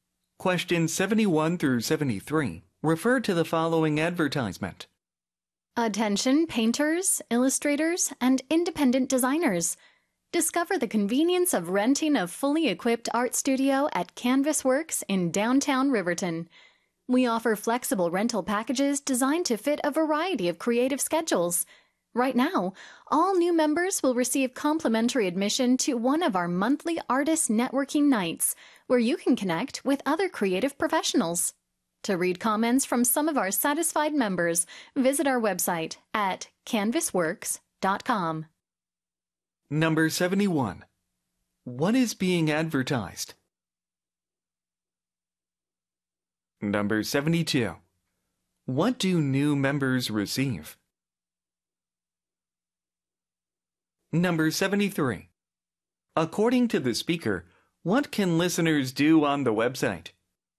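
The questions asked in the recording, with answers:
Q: What is being advertised?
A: Studio Rentals, 바로 B번이죠, B번.

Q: What do new members receive?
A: Free admission to a monthly artist networking night

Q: According to the speaker, what can listeners do on the website?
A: Read comments from satisfied members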